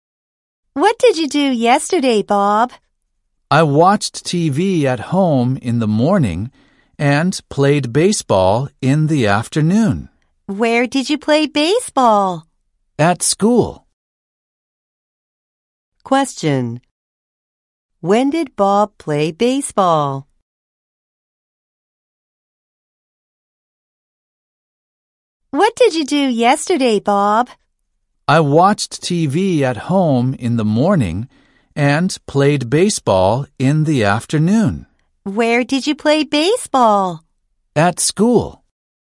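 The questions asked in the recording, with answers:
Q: Question. When did Bob play baseball?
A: Yesterday afternoon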